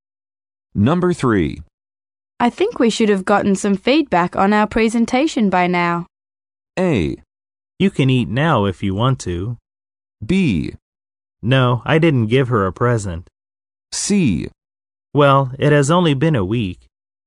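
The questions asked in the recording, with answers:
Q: I think we should have gotten some feedback on our presentation by now.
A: C: Well, it has only been a week.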